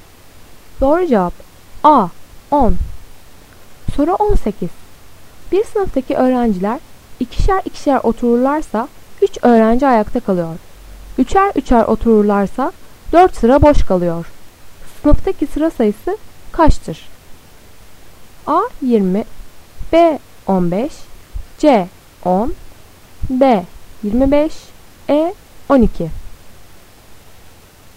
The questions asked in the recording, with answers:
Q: Sınıftaki sıra sayısı kaçtır?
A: Doğru cevap B 15.